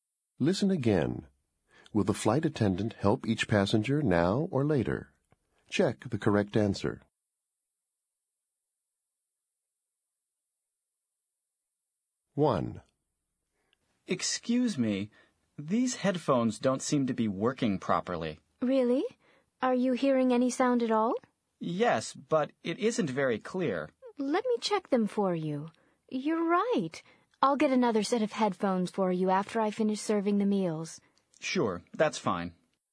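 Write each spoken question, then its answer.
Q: Will the flight attendant help each passenger now or later?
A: Later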